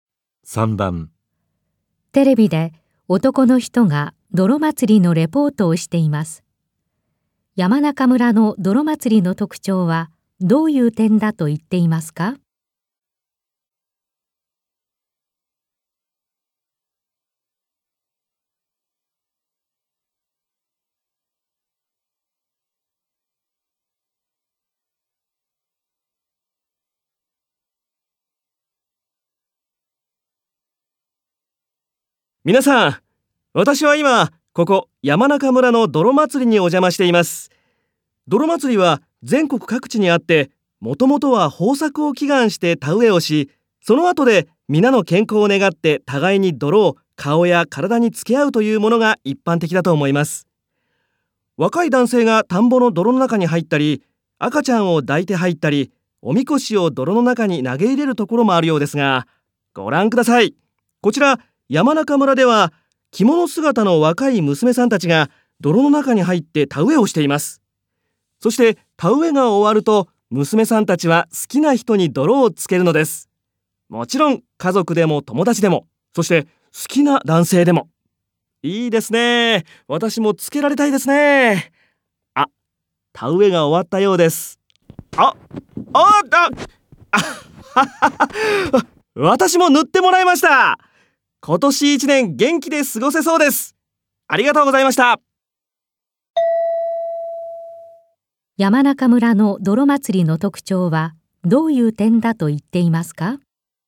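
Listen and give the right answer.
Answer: 着物姿の若い娘さんたちが泥の中で田植えをし、終わると好きな人に泥をつける点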